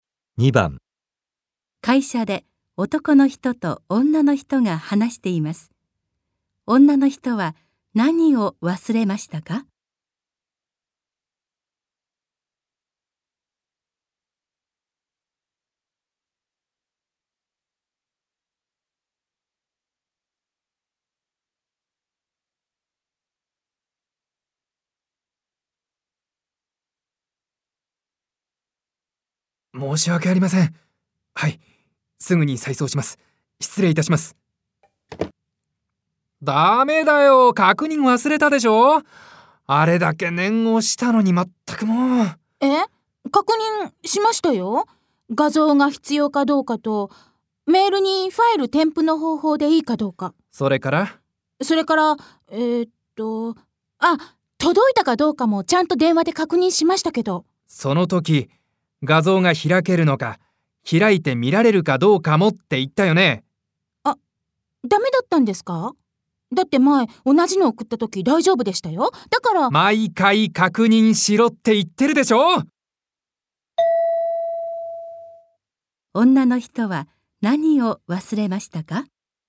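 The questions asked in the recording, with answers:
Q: 女の人は何を忘れましたか?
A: 画像が開いて見られるかどうかの確認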